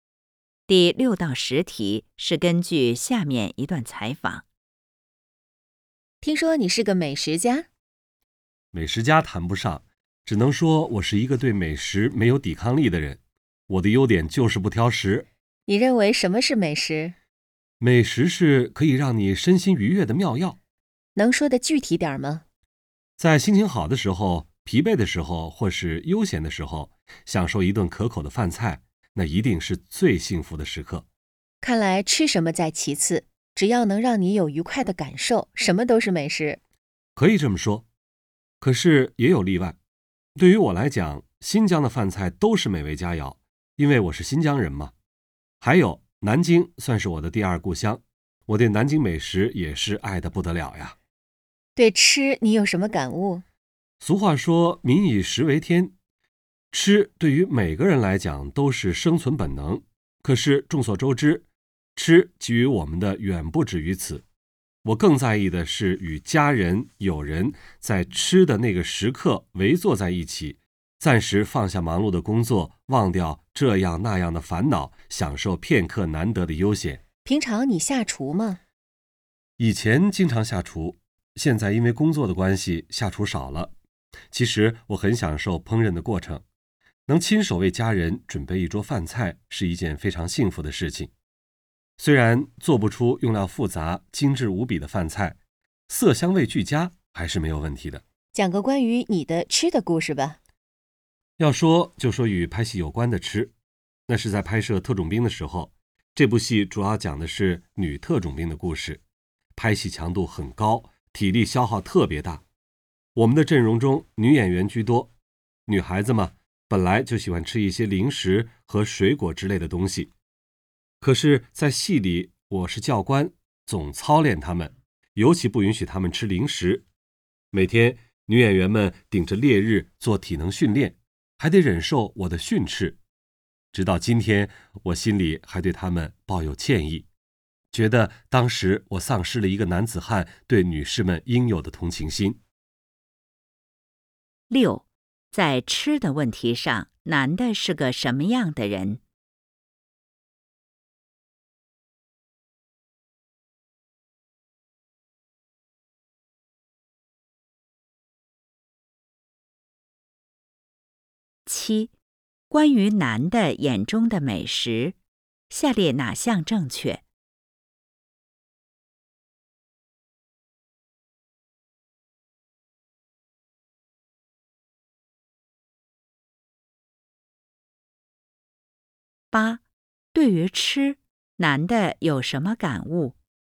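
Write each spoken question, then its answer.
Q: 在吃的问题上,男的是个什么样的人?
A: 不挑食,对美食没有抵抗力

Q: 对于吃,男的有什么感悟?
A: 更在意与家人友人围坐在一起,放下工作和烦恼,享受悠闲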